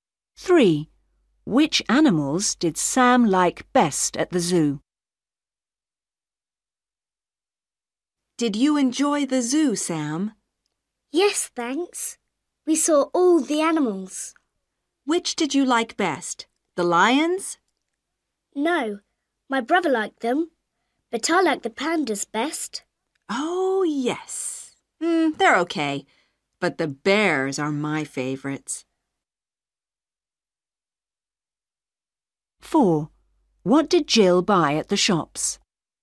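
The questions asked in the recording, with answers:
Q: Which animals did Sam like best at the zoo?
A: The pandas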